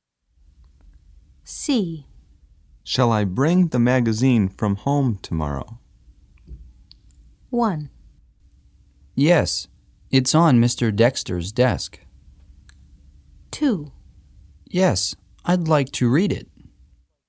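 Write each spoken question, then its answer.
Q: Shall I bring the magazine from home tomorrow?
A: 2: Yes, I'd like to read it.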